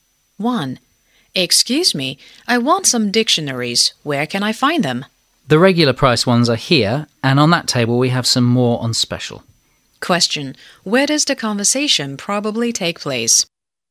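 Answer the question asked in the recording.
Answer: In a bookstore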